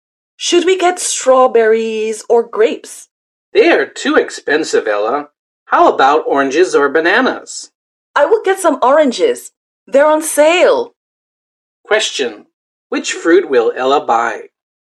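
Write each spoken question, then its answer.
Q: Which fruit will Ella buy?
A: Oranges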